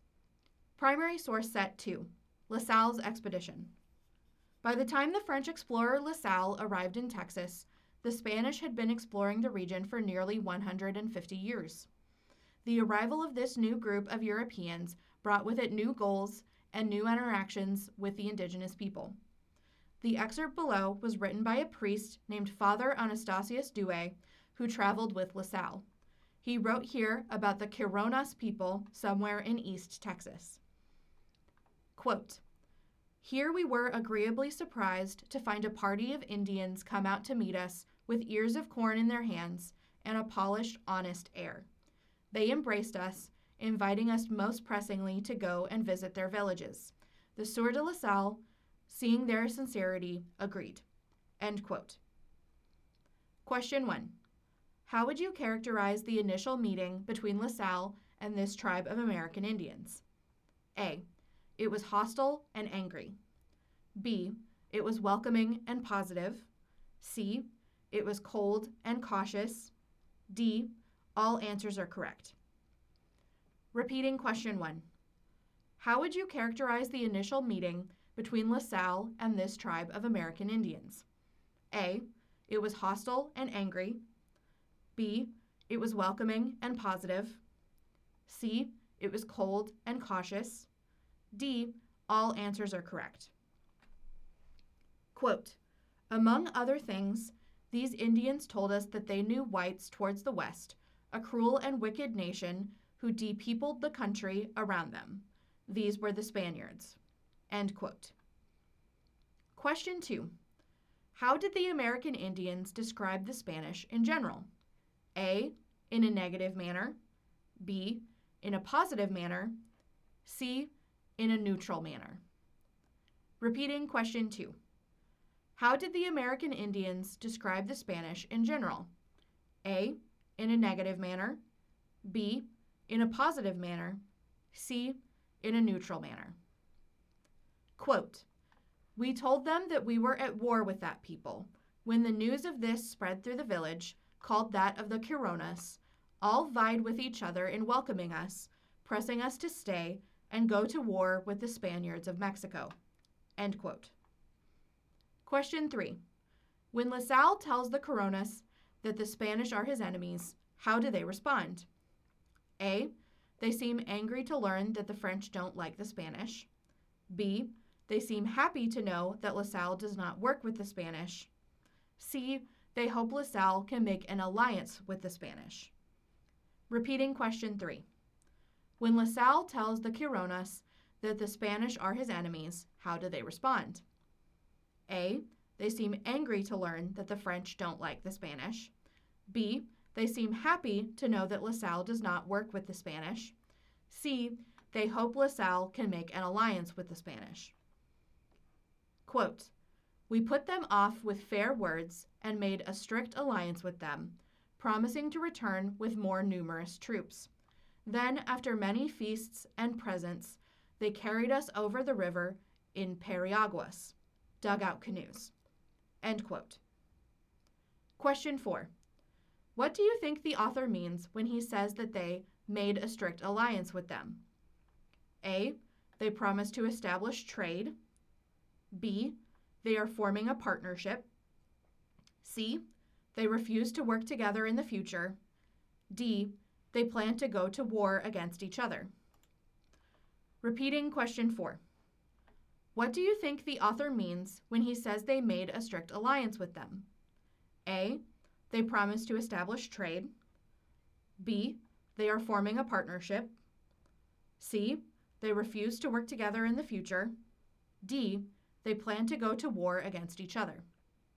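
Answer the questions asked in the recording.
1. B: It was welcoming and positive.
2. A: In a negative manner.
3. B: They seem happy to know that La Salle does not work with the Spanish.
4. B: They are forming a partnership.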